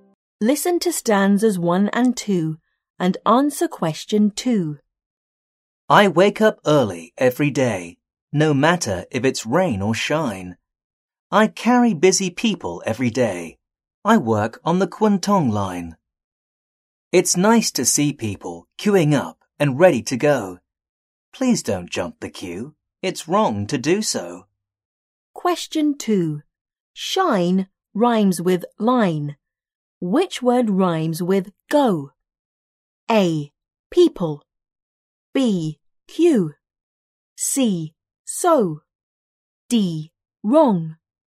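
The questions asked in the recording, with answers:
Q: Which word rhymes with go?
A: C: So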